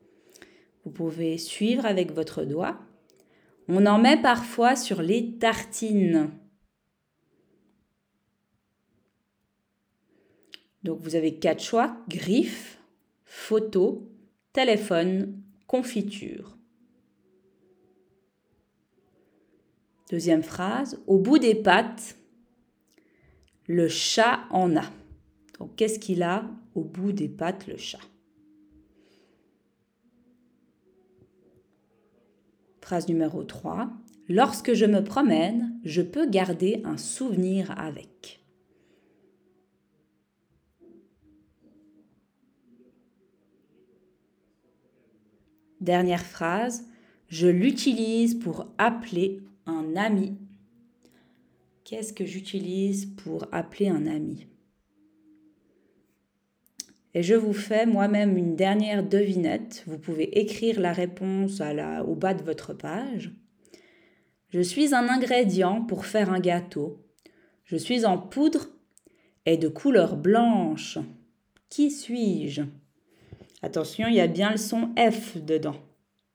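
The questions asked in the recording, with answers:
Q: On en met parfois sur les tartines.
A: confiture

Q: Donc, qu'est-ce qu'il a au bout des pattes, le chat?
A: griffe

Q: Lorsque je me promène, je peux garder un souvenir avec.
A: photo

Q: Qu'est-ce que j'utilise pour appeler un ami?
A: téléphone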